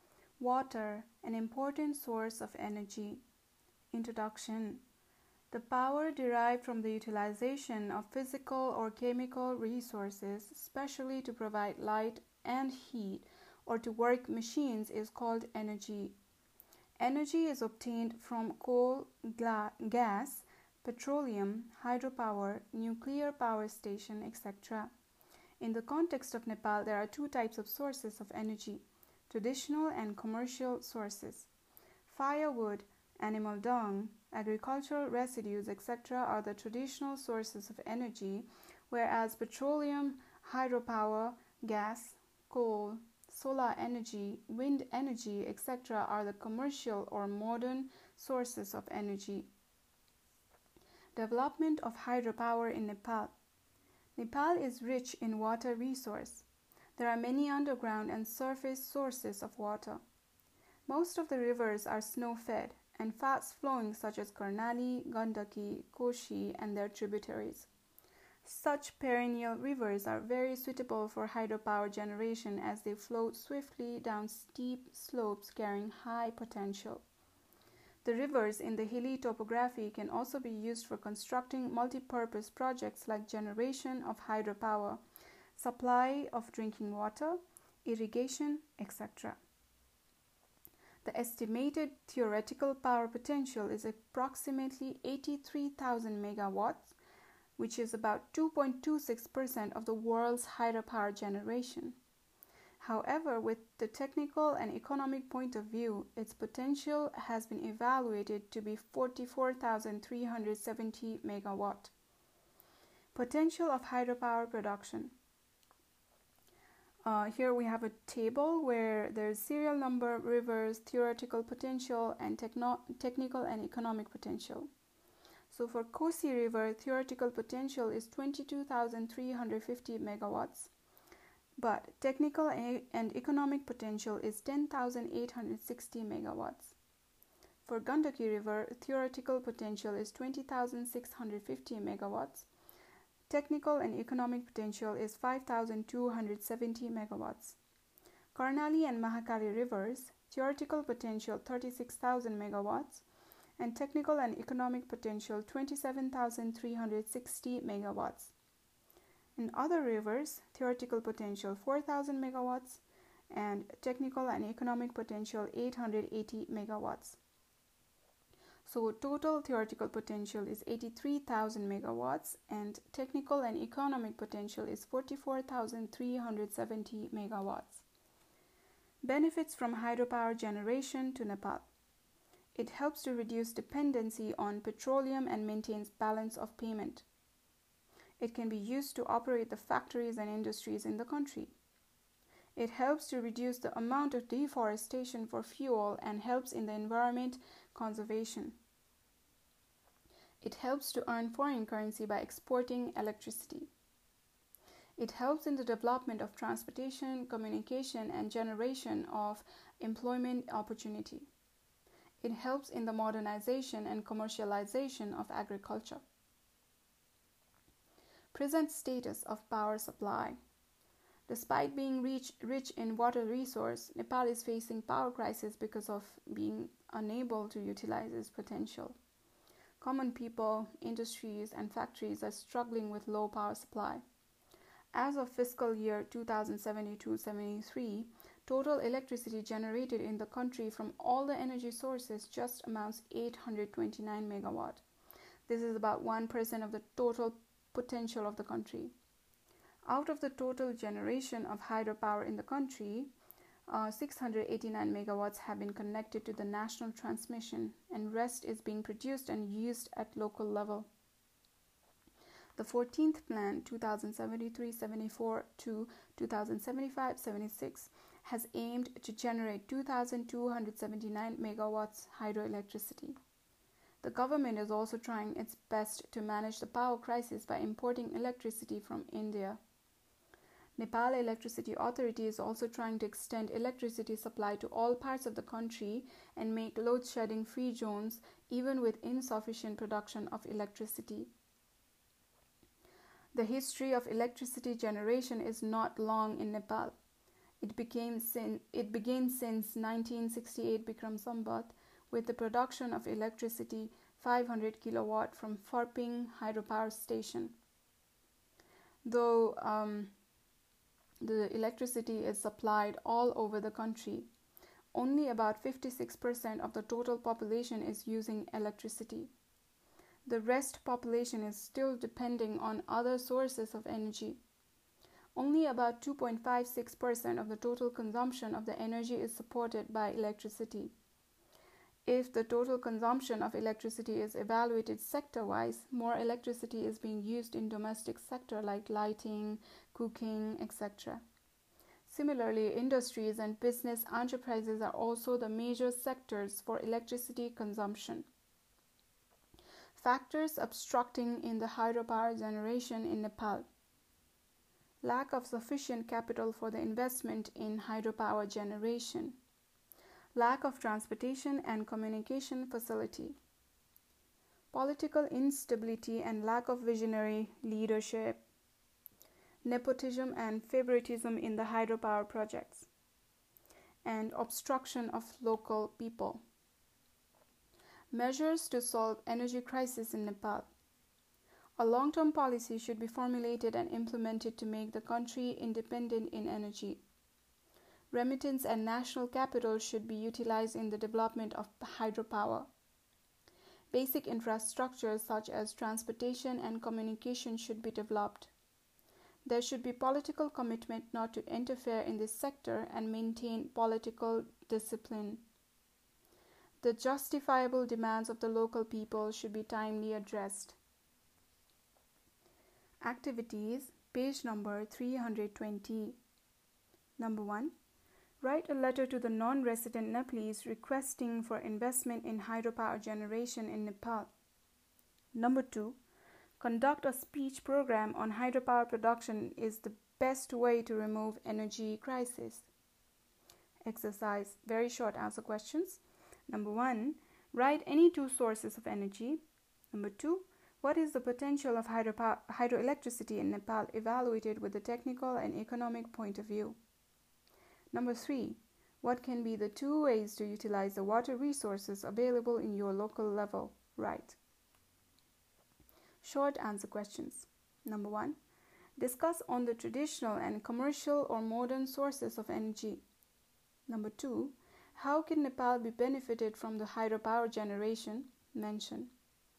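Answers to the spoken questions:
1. Any two, e.g. coal and hydropower (also gas, petroleum, nuclear power)
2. 44,370 megawatts
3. It can reduce dependence on petroleum, power industries, reduce deforestation, earn foreign currency from electricity exports, support transport, communication and jobs, and modernize agriculture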